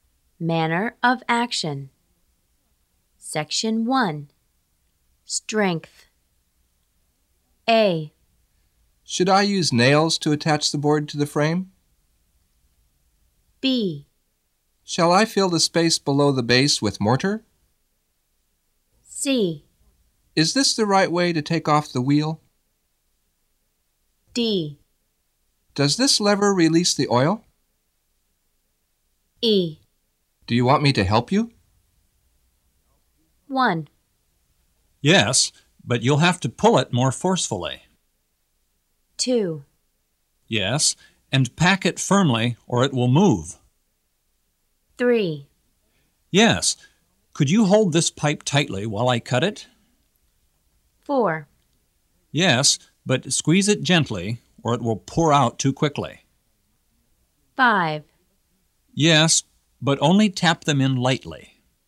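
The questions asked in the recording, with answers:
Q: Yes, and pack it firmly or it will move.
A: B: Shall I fill the space below the base with mortar?

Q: Yes, could you hold this pipe tightly while I cut it?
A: E: Do you want me to help you?

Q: Yes, but squeeze it gently, or it will pour out too quickly.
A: D: Does this lever release the oil?

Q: Yes, but only tap them in lightly.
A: A: Should I use nails to attach the board to the frame?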